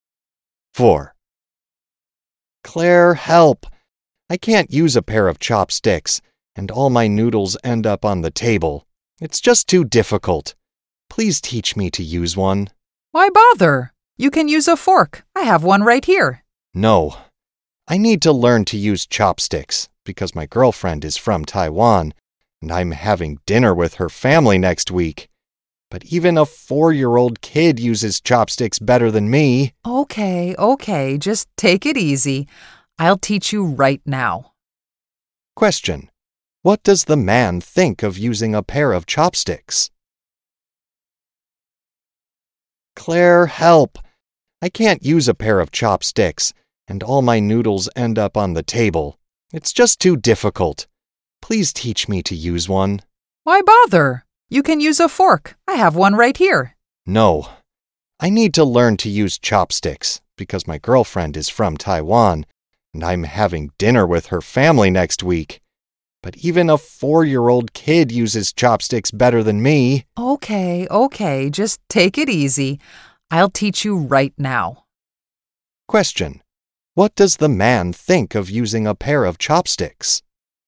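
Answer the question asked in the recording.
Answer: It's too difficult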